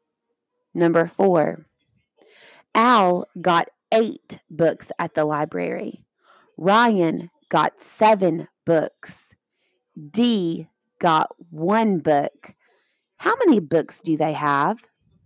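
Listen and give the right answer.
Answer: 16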